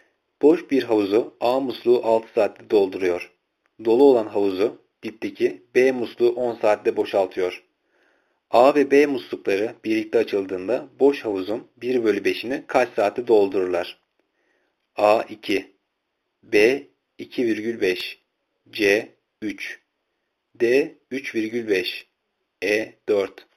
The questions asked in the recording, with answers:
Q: A ve B muslukları birlikte açıldığında boş havuzun 1 bölü 5'ini kaç saatte doldururlar?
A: Cevap C 3.